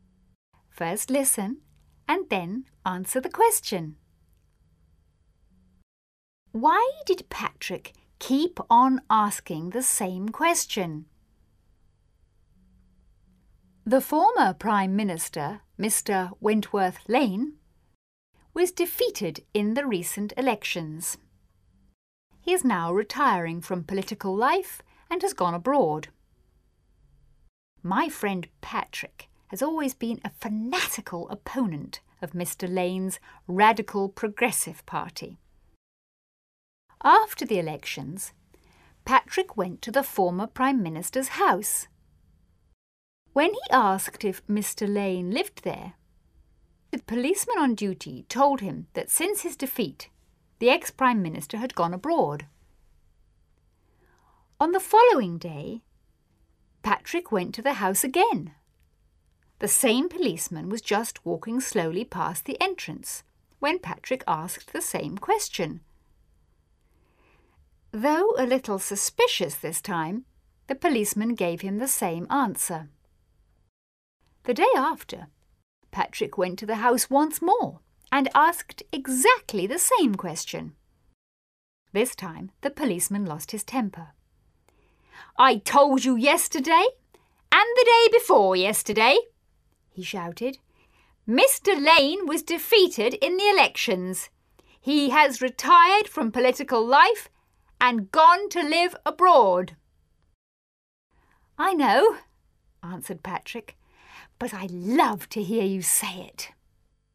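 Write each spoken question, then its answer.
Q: Why did Patrick keep on asking the same question?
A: He loved to hear the policeman say that Mr. Lane had been defeated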